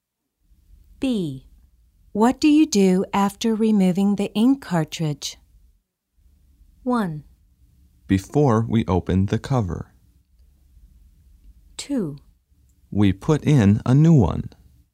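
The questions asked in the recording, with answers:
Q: What do you do after removing the ink cartridge?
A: 2: We put in a new one.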